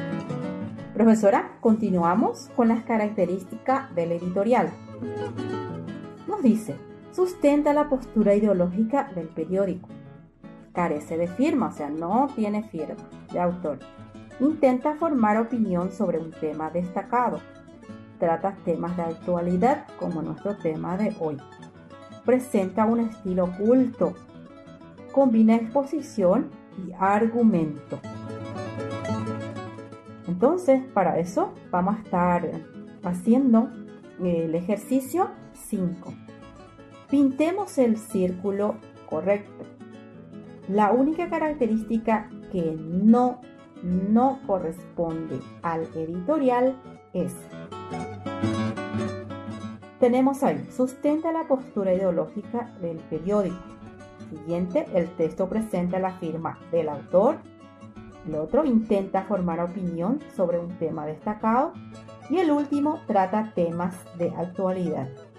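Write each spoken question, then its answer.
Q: La única característica que no corresponde al editorial es.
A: B: el texto presenta la firma del autor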